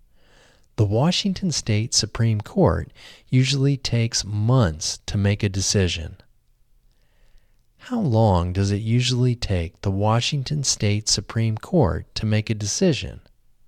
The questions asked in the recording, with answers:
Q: How long does it usually take the Washington State Supreme Court to make a decision?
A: It usually takes the Washington State Supreme Court months to make a decision.